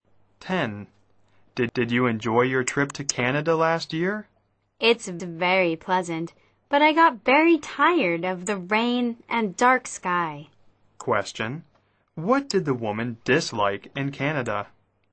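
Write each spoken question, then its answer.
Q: Question. What did the woman dislike in Canada?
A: The rain and dark sky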